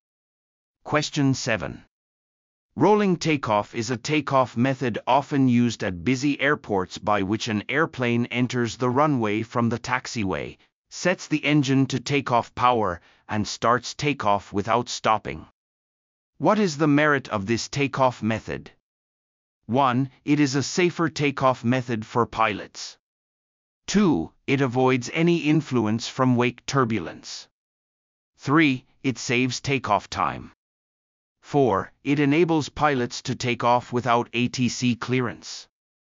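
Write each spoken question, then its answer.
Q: What is the merit of this takeoff method?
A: 3: It saves takeoff time.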